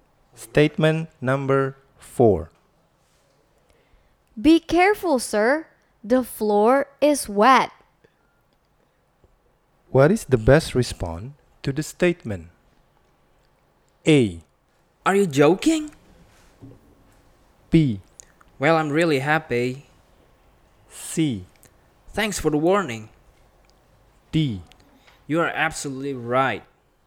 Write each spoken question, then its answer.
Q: What is the best response to the statement?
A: Nomor 4. Jawabannya C. Thanks for the warning.